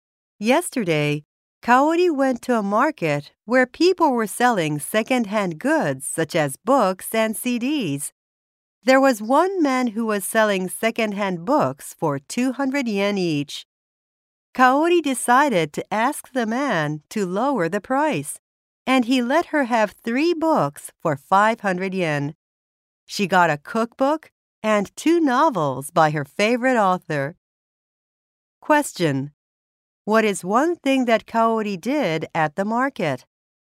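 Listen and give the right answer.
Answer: She asked the man to lower the price of the books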